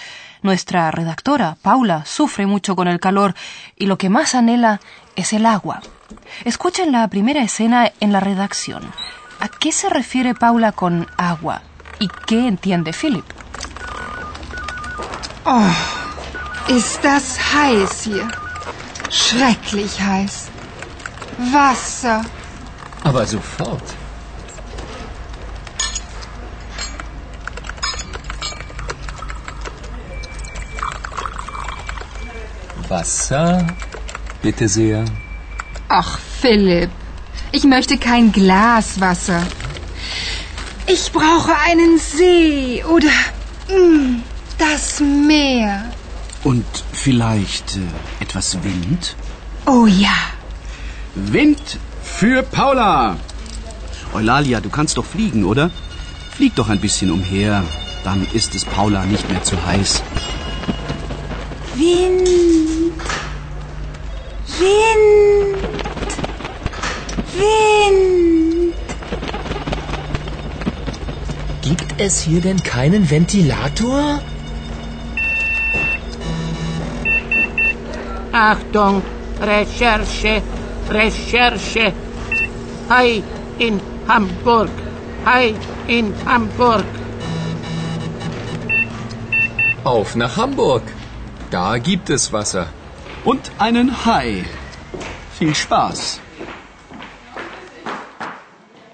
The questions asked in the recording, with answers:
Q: ¿A qué se refiere Paula con agua?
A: Ella está extrañando la presencia de un lago o incluso del mar.

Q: ¿Y qué entiende Philip?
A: Y uno puede pensar tranquilamente, al igual que Philip, que Paula tiene sed y le gustaría tomar un vaso de agua.